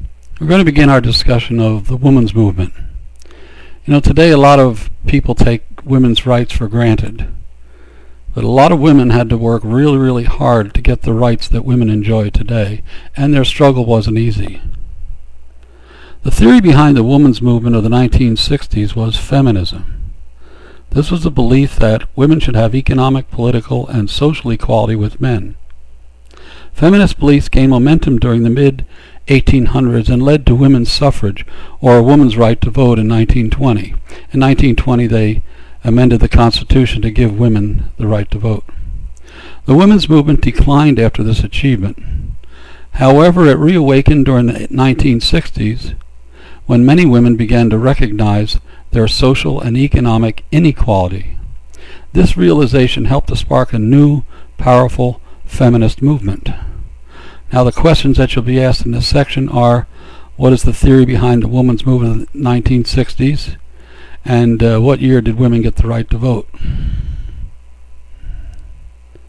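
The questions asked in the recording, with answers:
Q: what is the theory behind the women's movement of the 1960s?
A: Feminism

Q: And what year did women get the right to vote?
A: 1920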